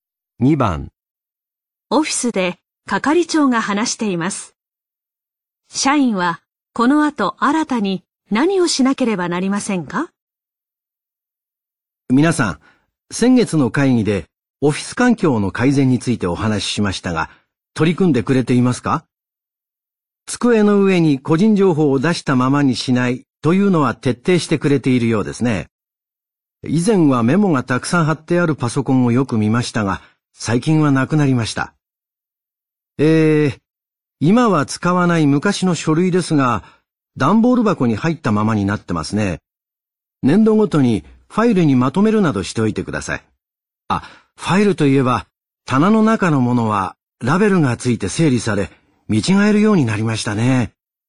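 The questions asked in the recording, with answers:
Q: 社員はこの後新たに何をしなければなりませんか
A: 古い書類を年度ごとにファイルにまとめる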